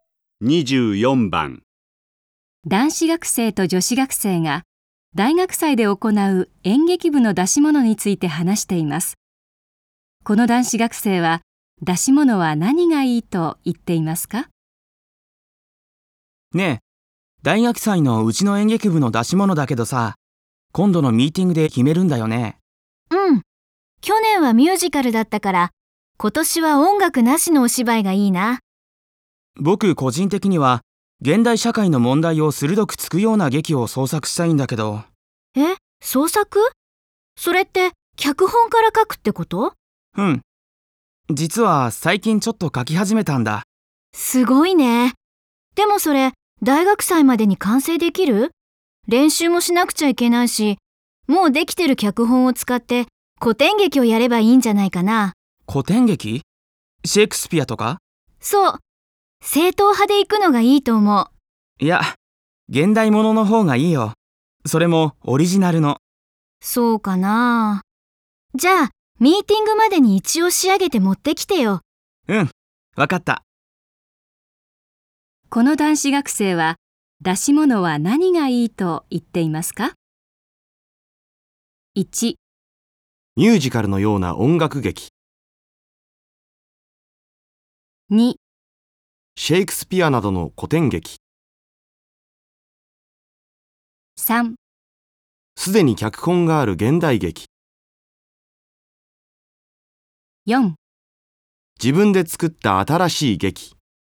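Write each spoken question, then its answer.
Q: この男子学生は出し物は何がいいと言っていますか?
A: 4: 自分で作った新しい劇。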